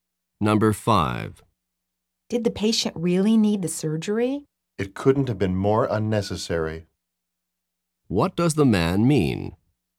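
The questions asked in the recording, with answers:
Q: What does the man mean?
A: The surgery was completely unnecessary.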